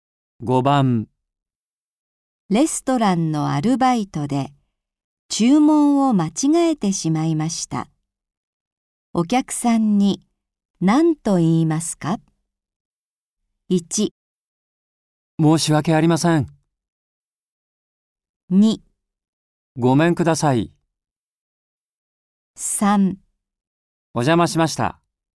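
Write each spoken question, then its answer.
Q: お客さんに何と言いますか?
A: 1: 申し訳ありません。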